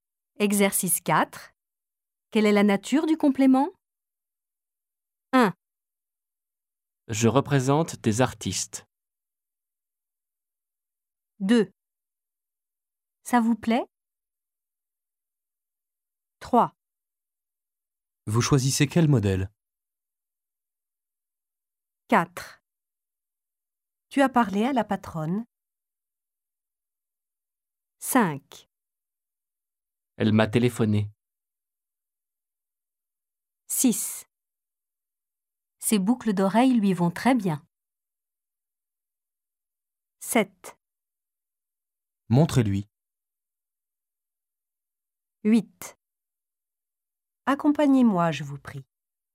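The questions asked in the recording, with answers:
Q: Je représente des artistes.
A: complément d'objet direct (des artistes)

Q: Ça vous plaît ?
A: complément d'objet indirect (vous)

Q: Vous choisissez quel modèle ?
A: complément d'objet direct (quel modèle)

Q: Tu as parlé à la patronne ?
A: complément d'objet indirect (à la patronne)

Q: Elle m'a téléphoné.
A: complément d'objet indirect (m')

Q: Ses boucles d'oreilles lui vont très bien.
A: complément d'objet indirect (lui)

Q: Montrez-lui.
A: complément d'objet indirect (lui)

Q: Accompagnez-moi, je vous prie.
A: complément d'objet direct (moi)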